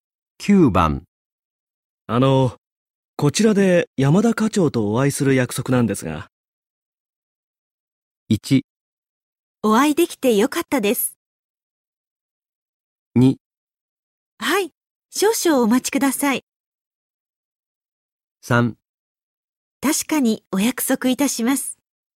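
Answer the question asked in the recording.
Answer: 2: はい、少々お待ちください。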